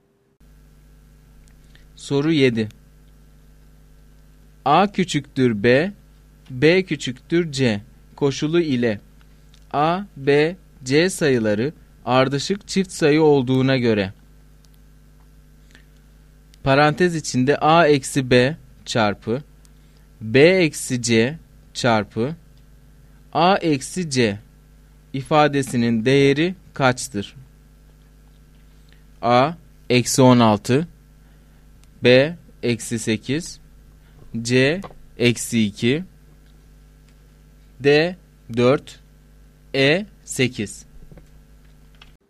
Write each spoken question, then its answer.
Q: Parantez içinde a eksi b çarpı b eksi c çarpı a eksi c ifadesinin değeri kaçtır?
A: Doğru cevap A şıkkı.